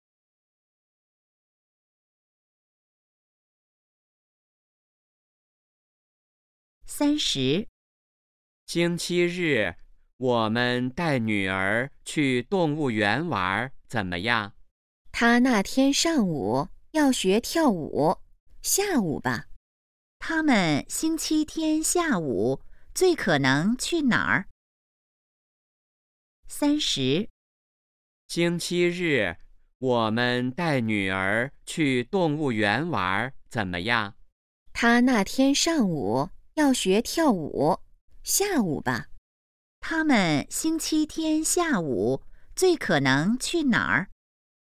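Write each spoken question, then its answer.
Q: 他们星期天下午最可能去哪儿?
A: 动物园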